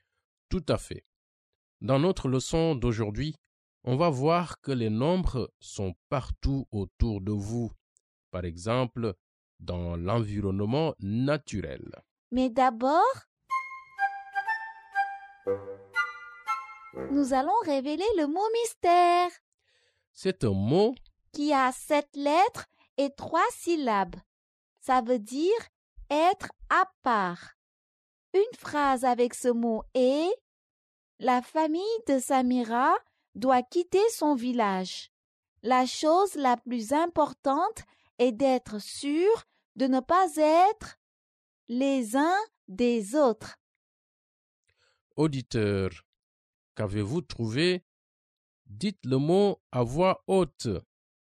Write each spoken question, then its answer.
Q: Auditeur, qu'avez-vous trouvé?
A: Le mot mystère est séparé.